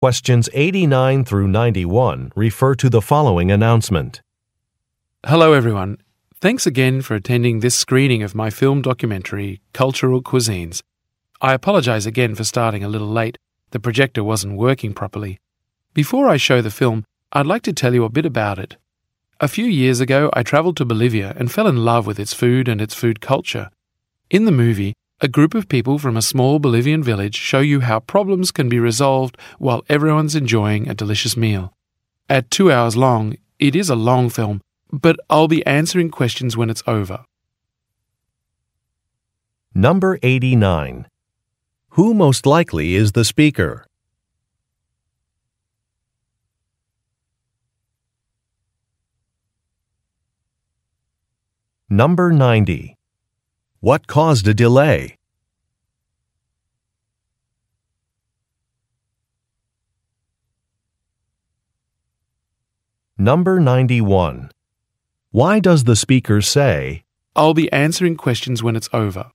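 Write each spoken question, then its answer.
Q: Who most likely is the speaker?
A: A filmmaker (documentary director)

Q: What caused a delay?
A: The projector wasn't working properly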